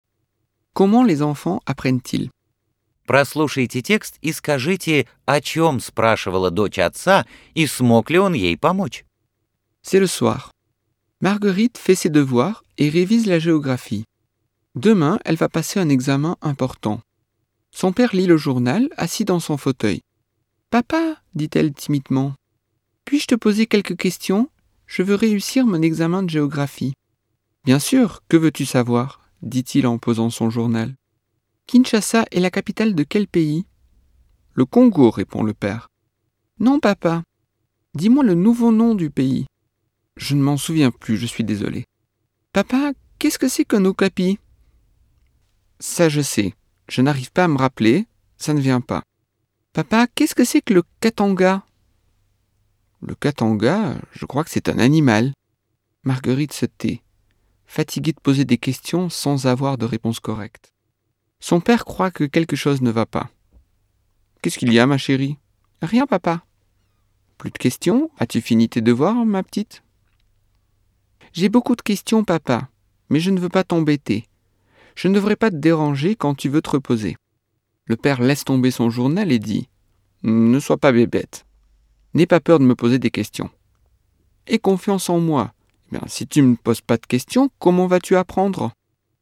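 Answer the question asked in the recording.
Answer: Она задавала вопросы по географии к экзамену (столица Киншаса, что такое окапи, что такое Катанга); нет, он не смог ей помочь.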